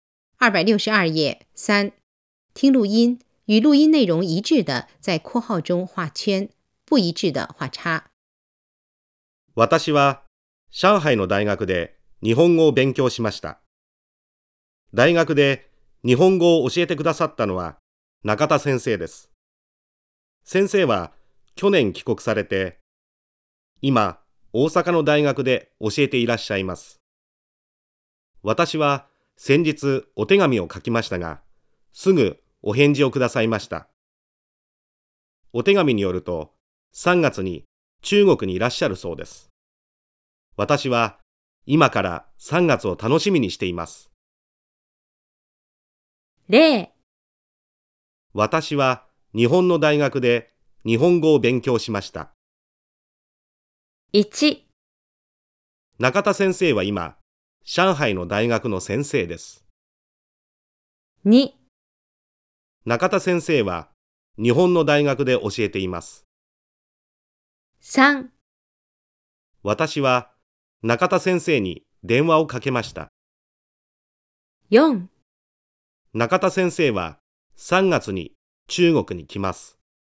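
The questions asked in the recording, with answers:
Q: 中田先生は今、上海の大学の先生です。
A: ×(大阪の大学で教えている)

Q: 私は中田先生に電話をかけました。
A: ×(手紙を書いた)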